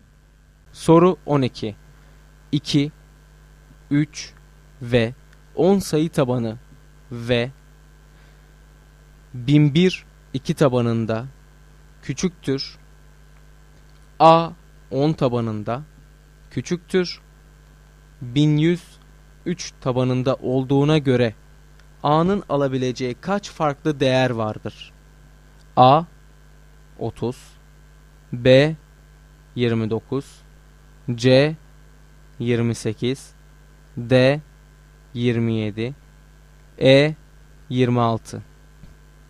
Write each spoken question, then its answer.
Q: 1100 3 tabanında olduğuna göre A'nın alabileceği kaç farklı değer vardır?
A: Doğru cevap E şıkkı.